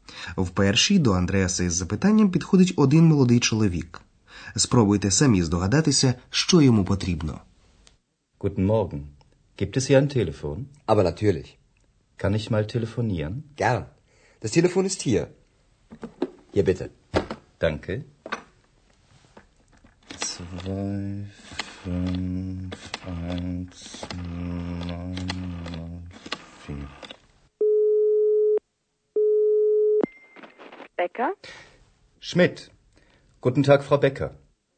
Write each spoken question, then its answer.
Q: Спробуйте самі здогадатися, що йому потрібно.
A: Чи зрозуміли ви, що юнак запитував в Андреаса про телефон?